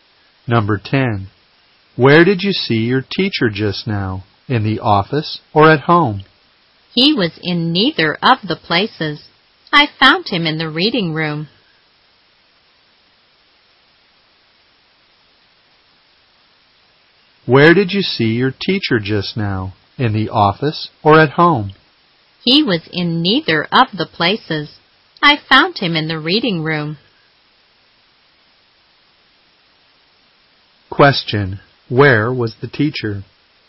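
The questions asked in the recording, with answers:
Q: Where was the teacher?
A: In the reading room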